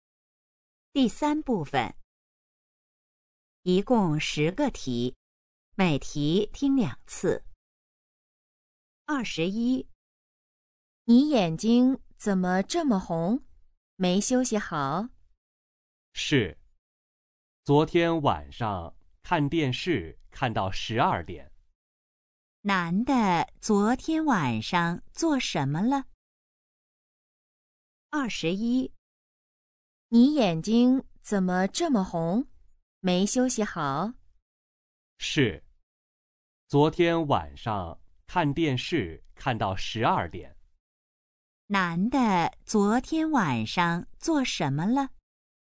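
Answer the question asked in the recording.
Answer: 看电视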